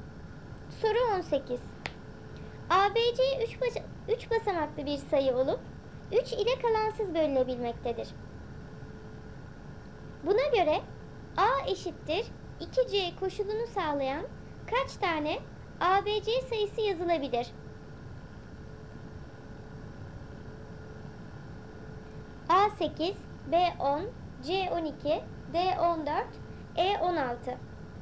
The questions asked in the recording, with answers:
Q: Buna göre A eşittir 2C koşulunu sağlayan kaç tane ABC sayısı yazılabilir?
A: Doğru cevap E16.